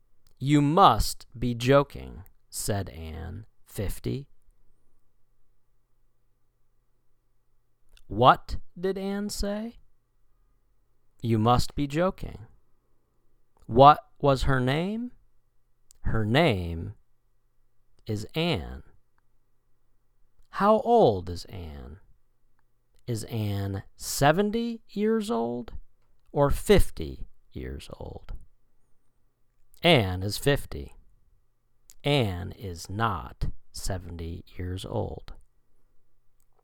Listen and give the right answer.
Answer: Anne is 50.